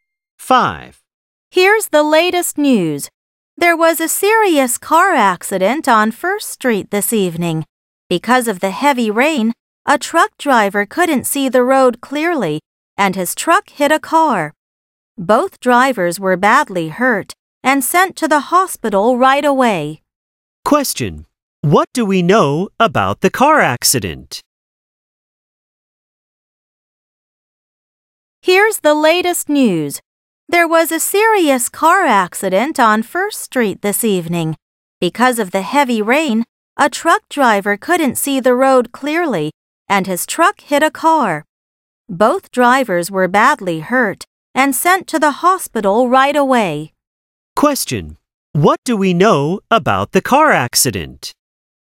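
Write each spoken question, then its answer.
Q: What do we know about the car accident?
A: Because of heavy rain, a truck hit a car and both drivers were badly hurt.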